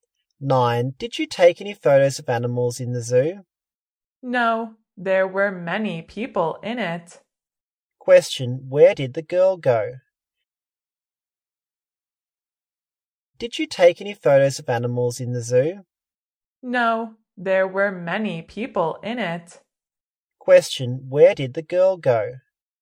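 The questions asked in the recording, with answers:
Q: Where did the girl go?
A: The zoo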